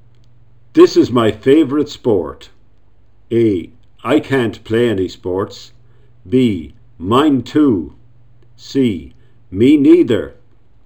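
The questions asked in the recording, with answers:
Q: This is my favorite sport.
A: B: Mine too.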